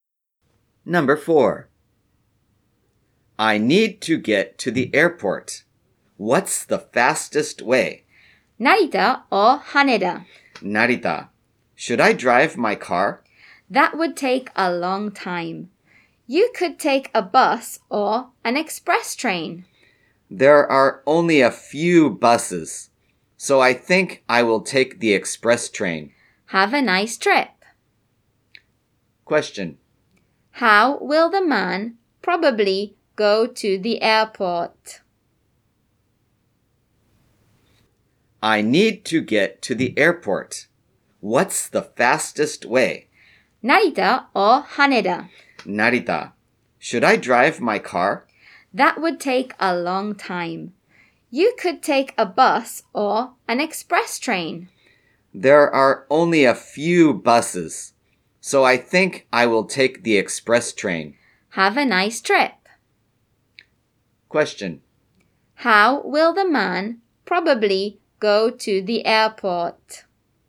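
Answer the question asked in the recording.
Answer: By express train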